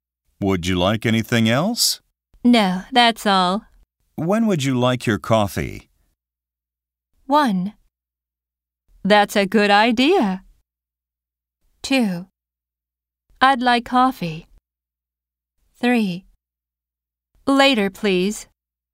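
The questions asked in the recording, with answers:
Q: When would you like your coffee?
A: 3: Later, please.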